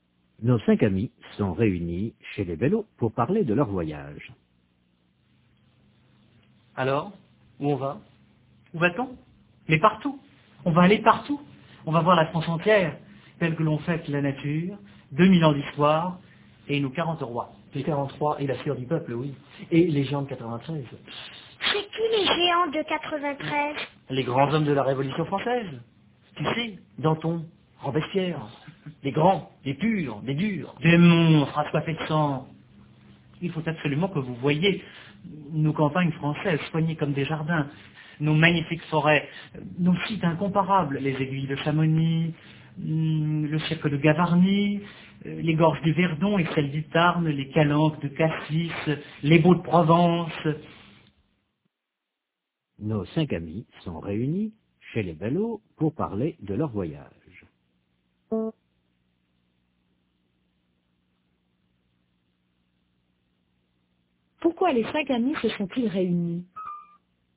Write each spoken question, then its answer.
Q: Pourquoi les cinq amis se sont-ils réunis?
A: Pour parler de leur voyage.